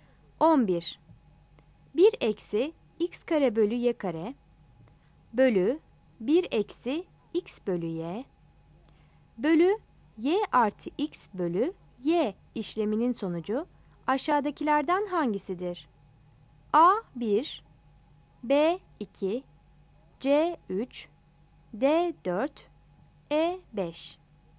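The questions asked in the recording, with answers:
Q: 1 eksi x kare bölü y kare bölü 1 eksi x bölü y bölü y artı x bölü y işleminin sonucu aşağıdakilerden hangisidir?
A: A: 1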